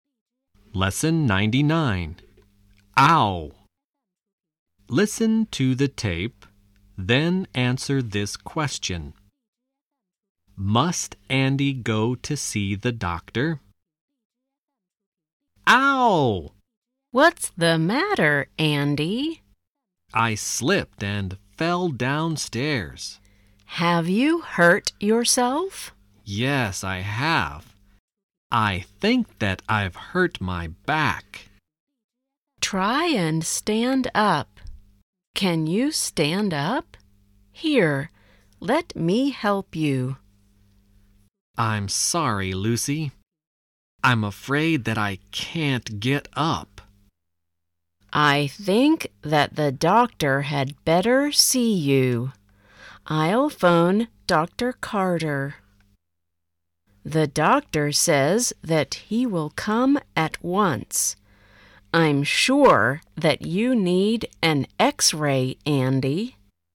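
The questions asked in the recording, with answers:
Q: Must Andy go to see the doctor?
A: No, the doctor will come to see him at once.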